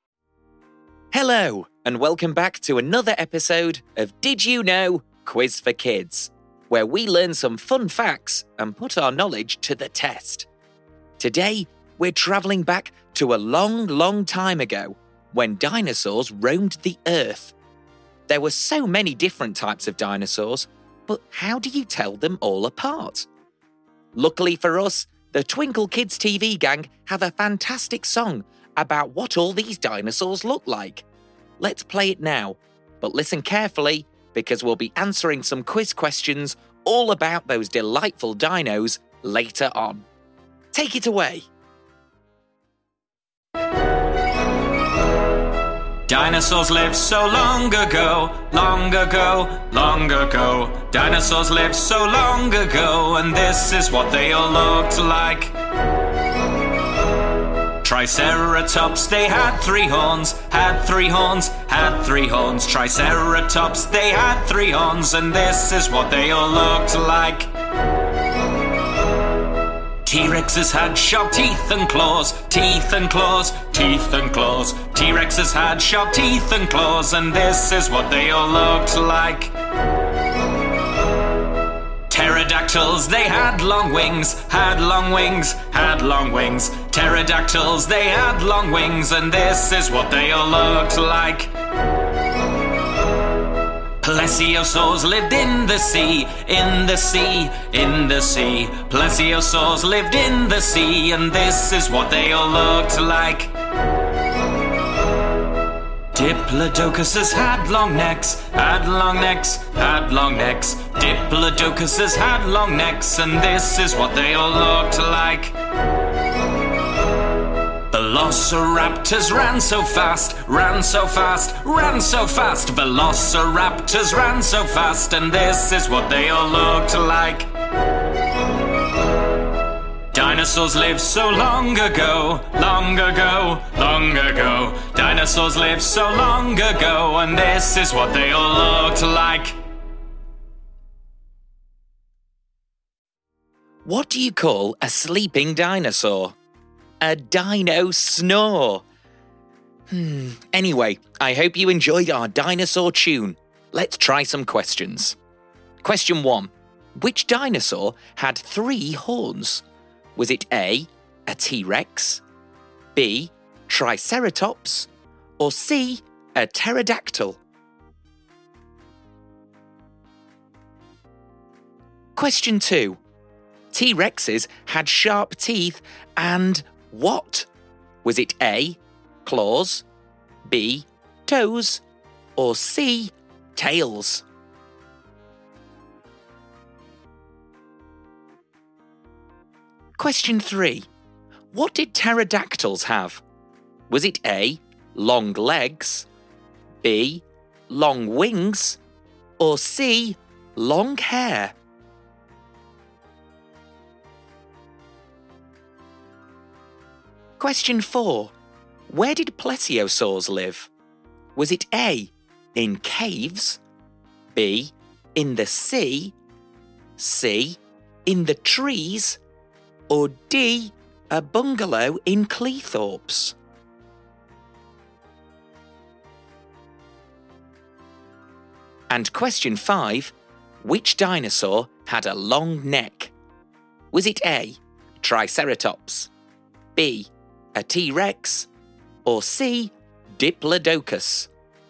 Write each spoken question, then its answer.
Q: Which dinosaur had three horns?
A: The answer is B, Triceratops.

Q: T-Rexes had sharp teeth and what?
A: The answer is A. T-Rexes had very sharp teeth and claws.

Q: What did pterodactyls have?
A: The answer was B. Pterodactyls had very long wings.

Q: Where did plesiosaurs live?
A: And the answer is B. Plesiosaurs lived in the sea.

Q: Which dinosaur had a long neck?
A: It's C. Diplodocuses had very long necks